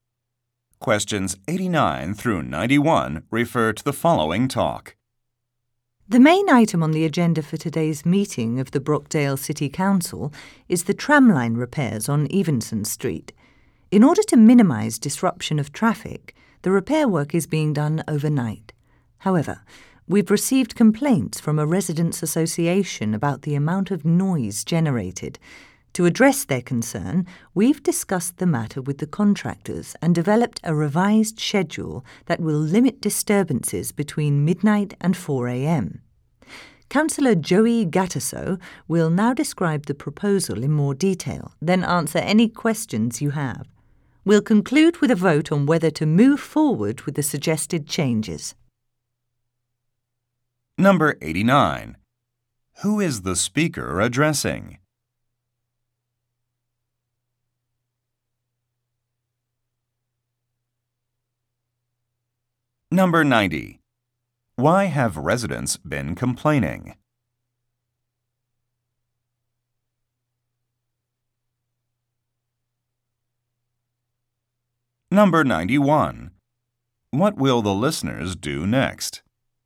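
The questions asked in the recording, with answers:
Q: Why have residents been complaining?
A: Noise from overnight repair work

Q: What will the listeners do next?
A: Hear a proposal from Councillor Gattaso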